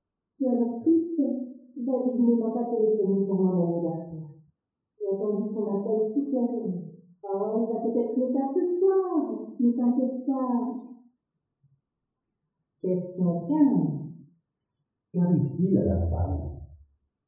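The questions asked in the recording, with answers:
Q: Qu'arrive-t-il à la femme ?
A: Elle est triste parce qu'il ne lui a pas téléphoné pour son anniversaire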